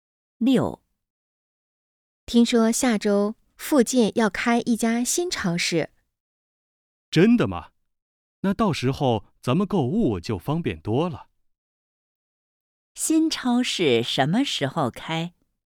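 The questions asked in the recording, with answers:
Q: 新超市什么时候开?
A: 下周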